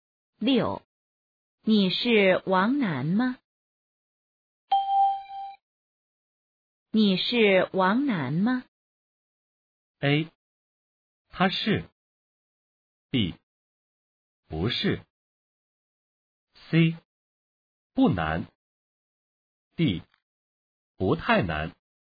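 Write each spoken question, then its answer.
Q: 你是王楠吗?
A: B: 不是。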